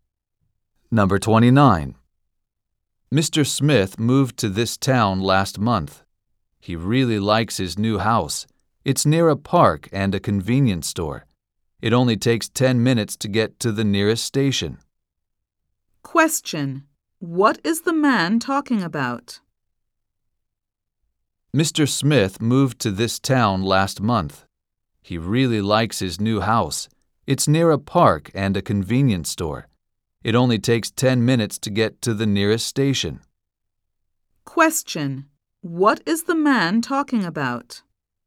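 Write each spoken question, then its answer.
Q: What is the man talking about?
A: His new house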